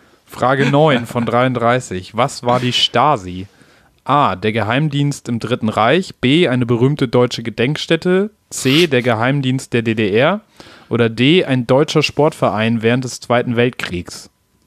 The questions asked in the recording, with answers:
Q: Was war die Stasi?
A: Geheimdienst in der DDR.